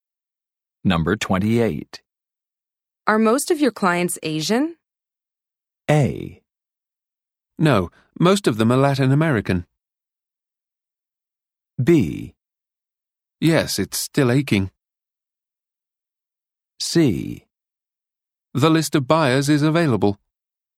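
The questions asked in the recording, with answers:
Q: Are most of your clients Asian?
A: A: No, most of them are Latin American.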